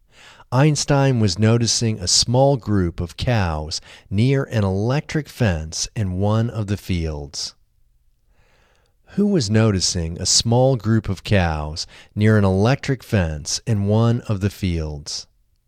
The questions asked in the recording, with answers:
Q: Who was noticing a small group of cows near an electric fence in one of the fields?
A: Einstein was noticing a small group of cows near an electric fence in one of the fields.